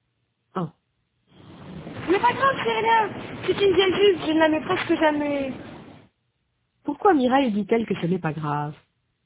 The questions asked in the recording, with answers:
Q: Pourquoi Mireille dit-elle que ce n'est pas grave?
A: Parce que c'est une vieille jupe.